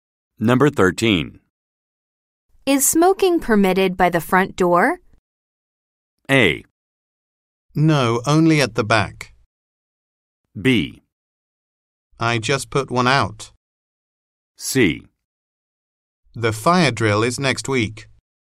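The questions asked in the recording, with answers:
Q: Is smoking permitted by the front door?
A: A: No, only at the back.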